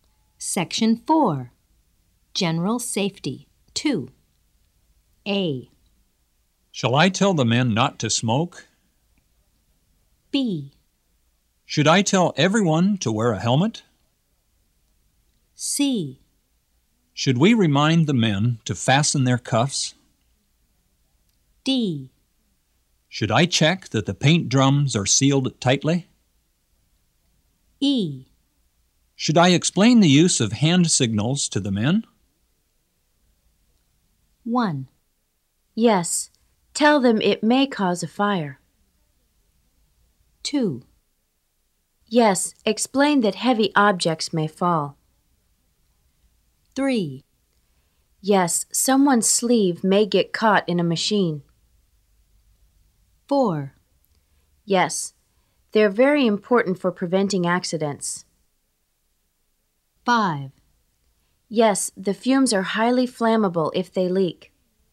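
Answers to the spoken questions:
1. A: Shall I tell the men not to smoke?
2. B: Should I tell everyone to wear a helmet?
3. C: Should we remind the men to fasten their cuffs?
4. E: Should I explain the use of hand signals to the men?
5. D: Should I check that the paint drums are sealed tightly?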